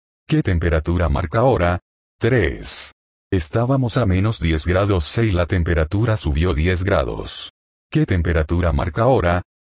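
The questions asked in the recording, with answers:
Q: ¿Qué temperatura marca ahora?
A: 0 grados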